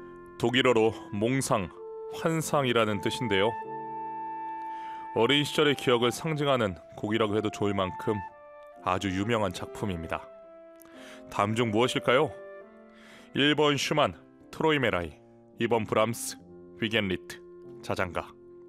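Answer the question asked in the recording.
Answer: 1: 슈만, 트로이메라이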